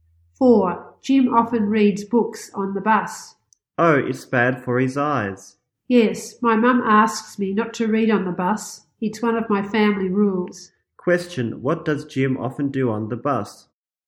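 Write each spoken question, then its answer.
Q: Question, what does Jim often do on the bus?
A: He reads books.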